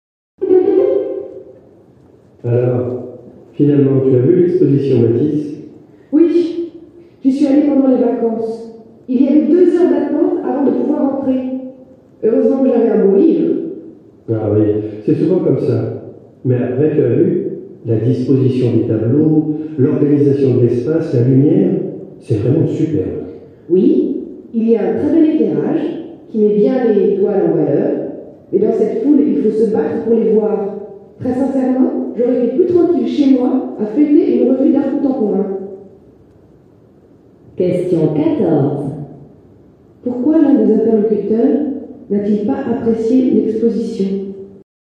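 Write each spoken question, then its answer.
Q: Pourquoi l'un des interlocuteurs n'a-t-il pas apprécié l'exposition ?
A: Il y avait trop de monde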